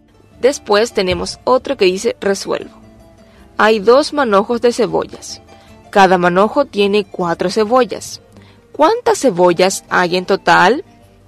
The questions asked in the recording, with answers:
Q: ¿Cuántas cebollas hay en total?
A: Hay en total 8 cebollas.